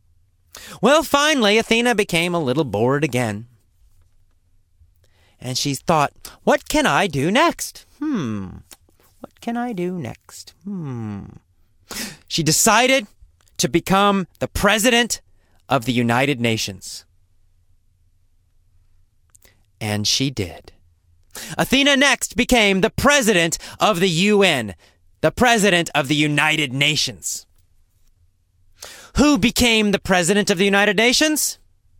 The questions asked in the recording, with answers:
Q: Who became the president of the United Nations?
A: Athena. Athena the dog. The most famous dog in the world.